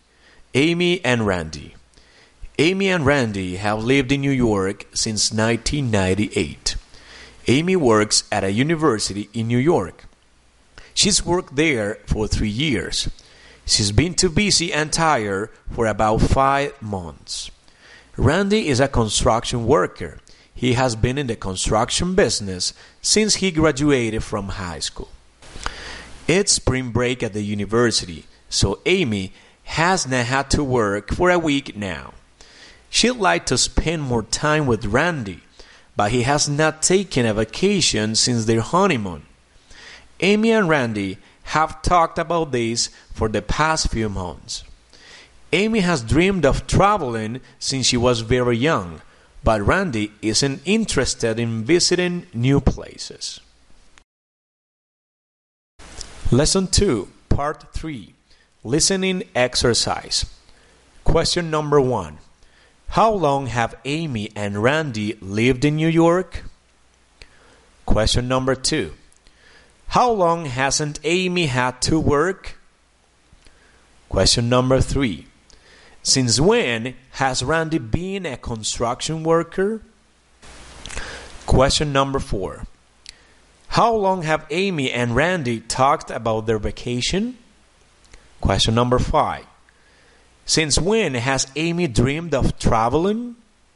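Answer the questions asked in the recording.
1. Since 1998
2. For a week
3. Since he graduated from high school
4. For the past few months
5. Since she was very young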